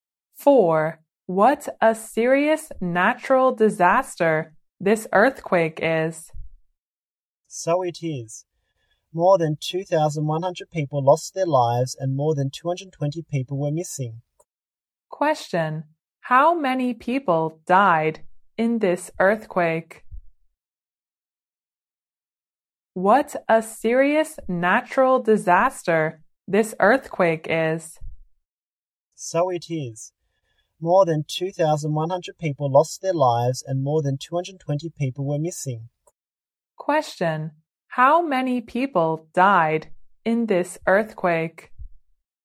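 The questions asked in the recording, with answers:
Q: How many people died in this earthquake?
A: More than 2,100.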